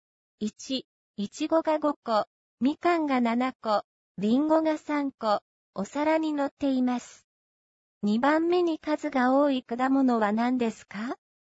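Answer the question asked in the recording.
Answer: いちご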